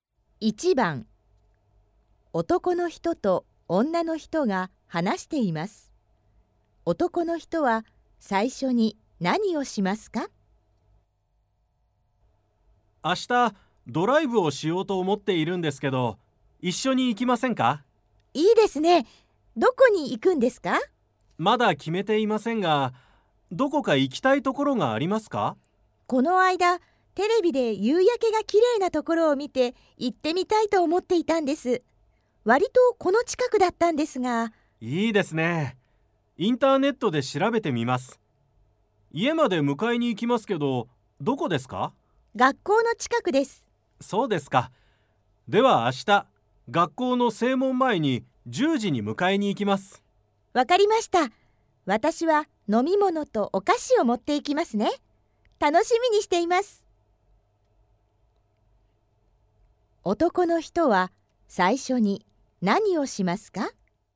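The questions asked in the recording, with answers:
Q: 男の人は最初に何をしますか?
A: インターネットで夕焼けが綺麗なところを調べる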